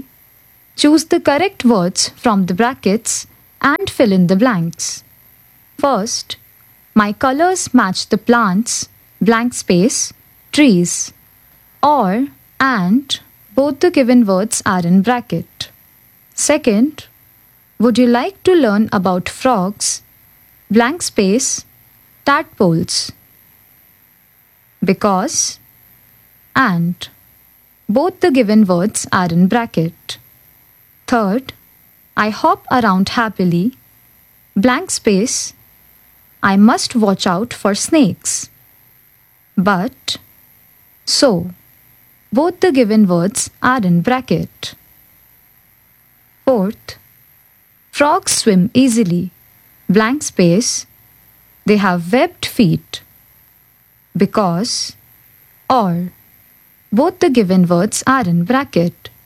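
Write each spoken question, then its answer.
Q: I hop around happily, blank space, I must watch out for snakes.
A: but

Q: frogs swim easily, blank space, they have webbed feet.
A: because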